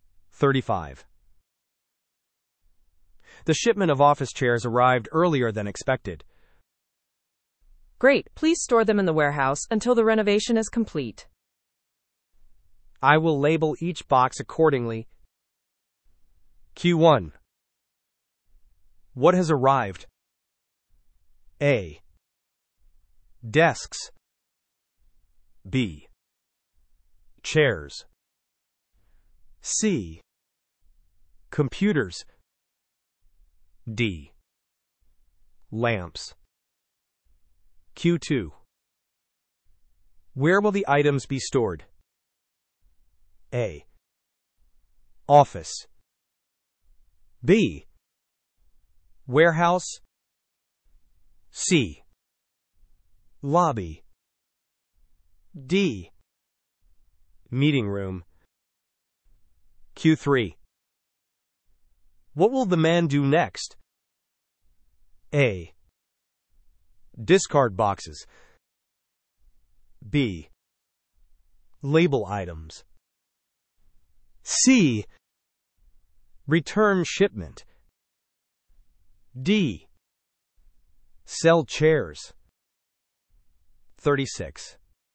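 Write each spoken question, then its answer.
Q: What has arrived?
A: B: Chairs.

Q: Where will the items be stored?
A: B: Warehouse.

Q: What will the man do next?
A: B: Label items.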